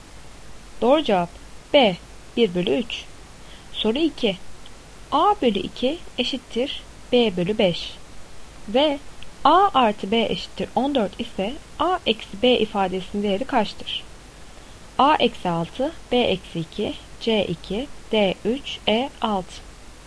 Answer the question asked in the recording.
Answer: Doğru cevap A eksi 6.